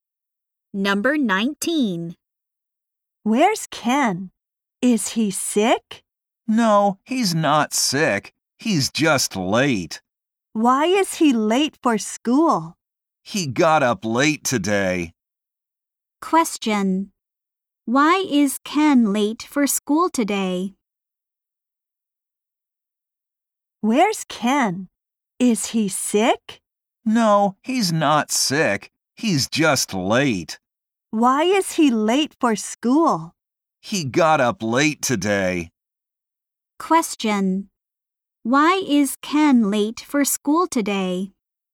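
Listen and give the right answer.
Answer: He got up late.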